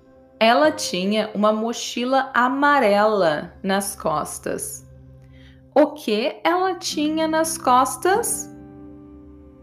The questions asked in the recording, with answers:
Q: O que ela tinha nas costas?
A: uma mochila amarela. Ela tinha uma mochila amarela nas costas.